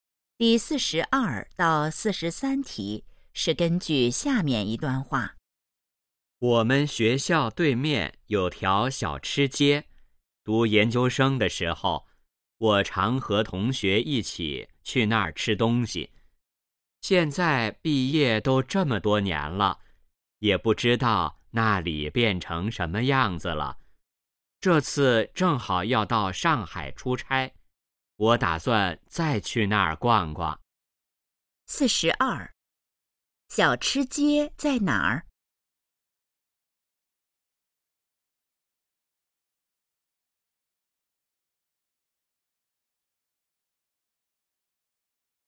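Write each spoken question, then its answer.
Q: 小吃街在哪儿?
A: 学校对面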